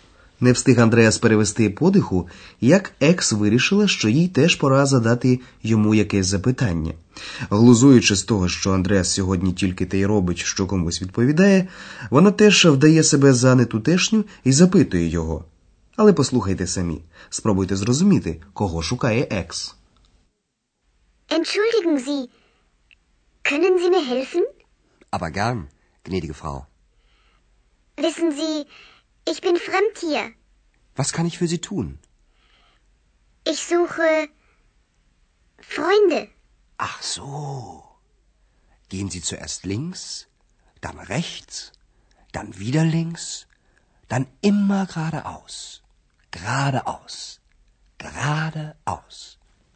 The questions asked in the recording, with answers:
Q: Але послухайте самі, спробуйте зрозуміти, кого шукає Екс.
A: Отже, Екс каже, що вона шукає друзів.